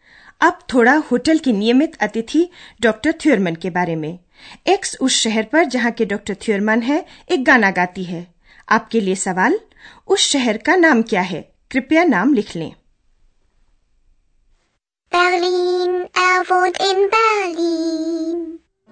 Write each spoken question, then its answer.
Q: उस शहर का नाम क्या है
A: Berlin बेलिन